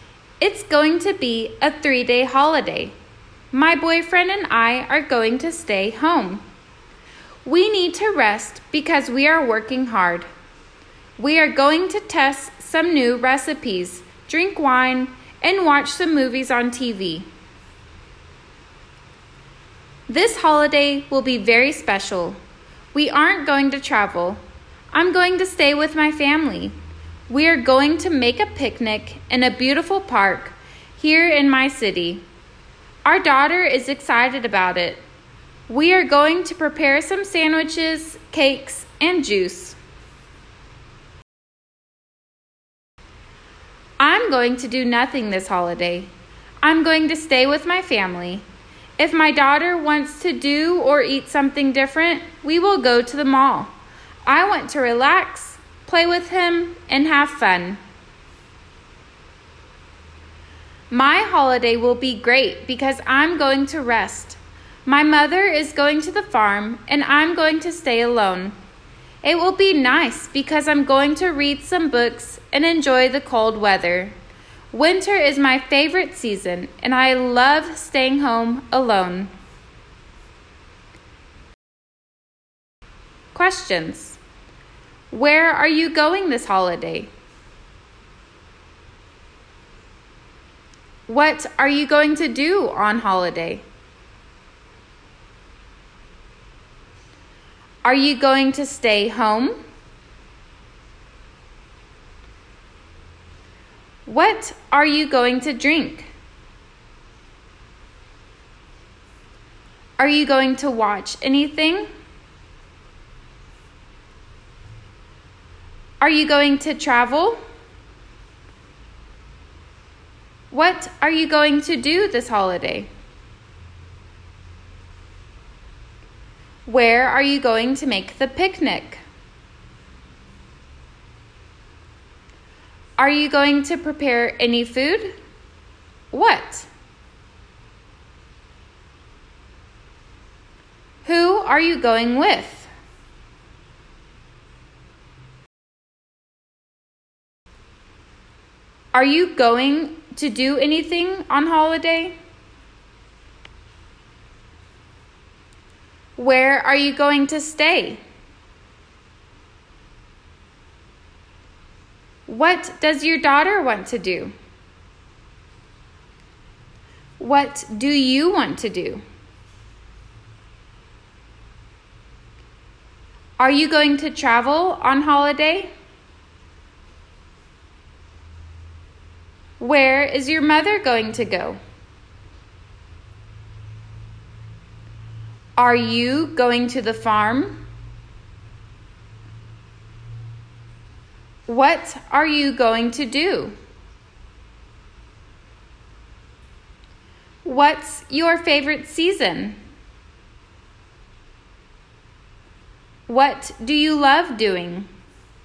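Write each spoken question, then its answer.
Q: Are you going to stay home?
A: Yes, the first speaker and her boyfriend are going to stay home.

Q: What are you going to drink?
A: Wine

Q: Are you going to watch anything?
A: Yes, some movies on TV

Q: Are you going to travel?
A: No

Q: Where are you going to make the picnic?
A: In a beautiful park in the speaker's city

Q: Are you going to prepare any food?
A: Yes

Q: What?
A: Sandwiches, cakes and juice

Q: Who are you going with?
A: With the speaker's family

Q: Are you going to do anything on holiday?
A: No, nothing

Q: Where are you going to stay?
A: With the speaker's family

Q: What do you want to do?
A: Relax, play with him and have fun

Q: Where is your mother going to go?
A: To the farm

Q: Are you going to the farm?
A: No, the speaker is going to stay alone

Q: What are you going to do?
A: Read some books and enjoy the cold weather

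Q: What's your favorite season?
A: Winter

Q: What do you love doing?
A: Staying home alone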